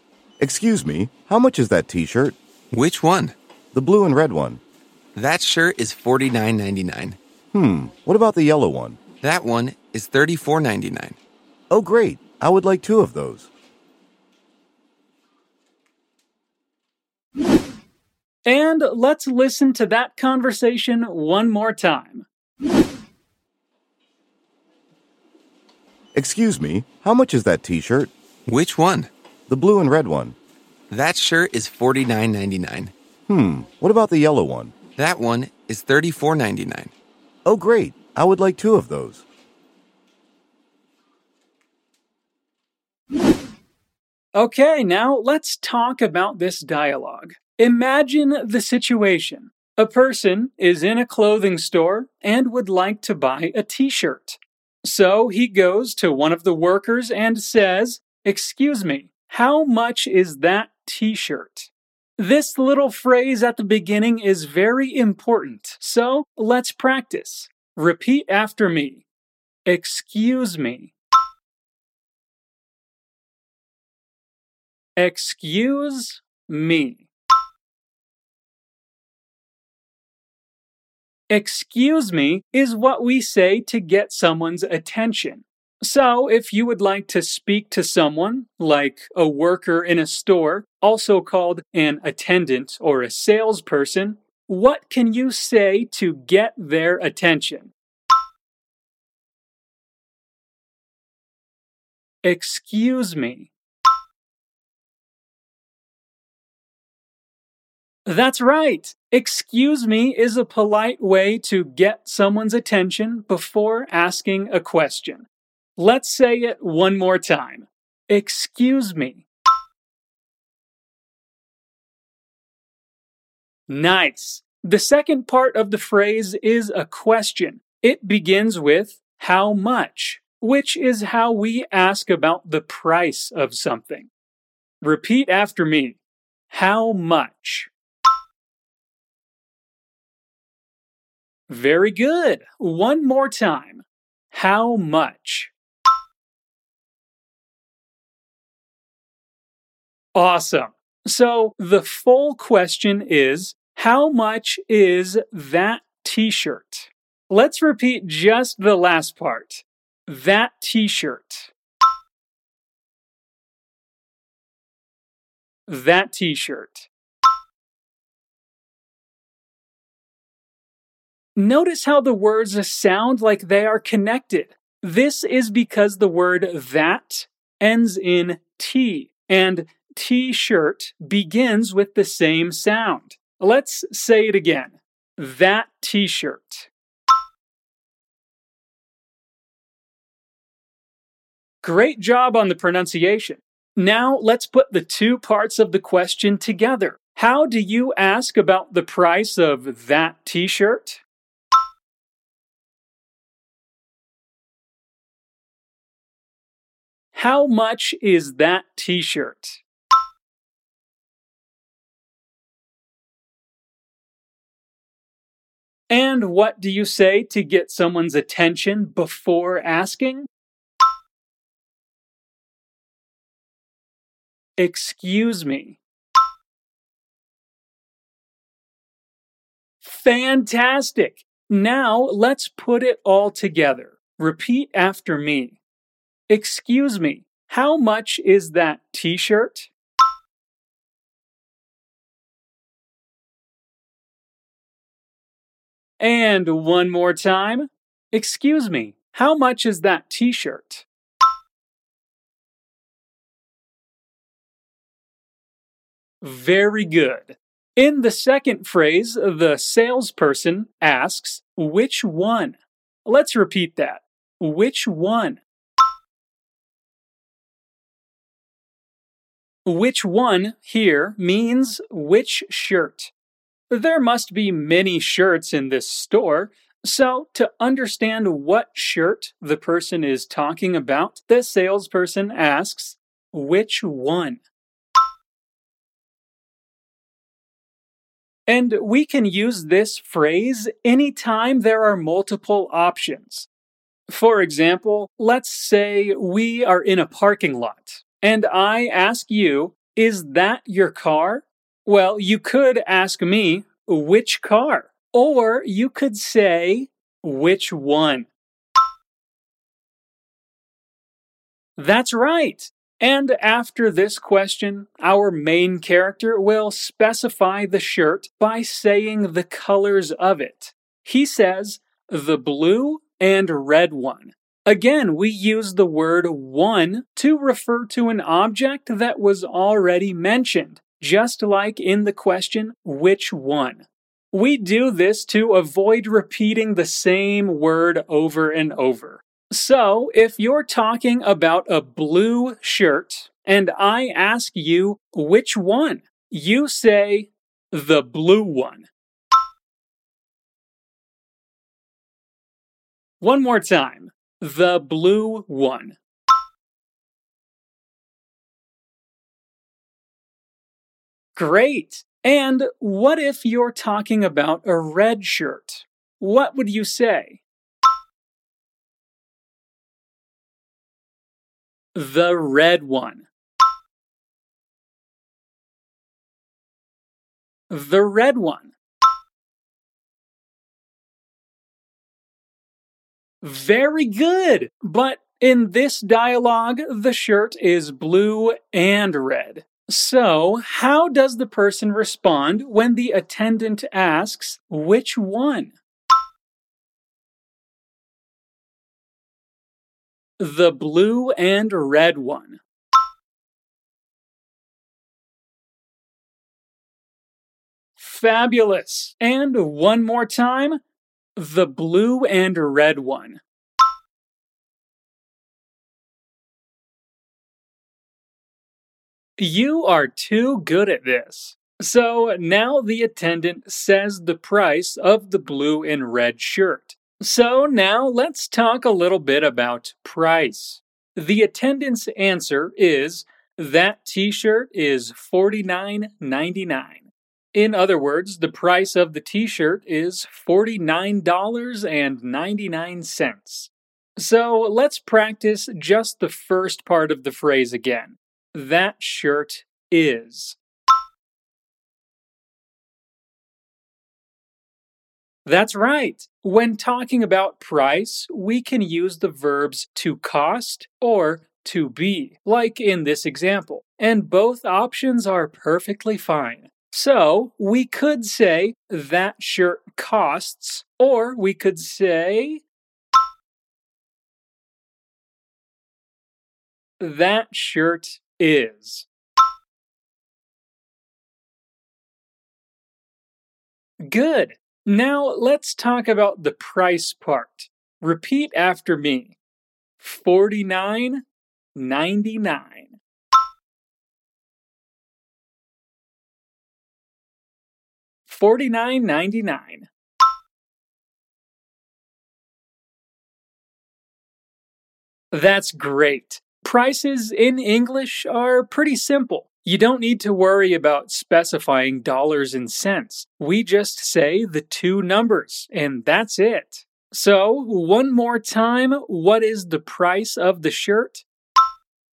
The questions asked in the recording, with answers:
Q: So, how does the person respond when the attendant asks, which one?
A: The blue and red one.

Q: So, one more time, what is the price of the shirt?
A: $49.99.